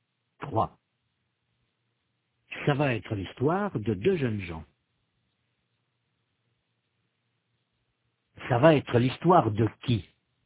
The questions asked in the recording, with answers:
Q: Ça va être l'histoire de qui?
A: Ça va être l'histoire de deux jeunes gens.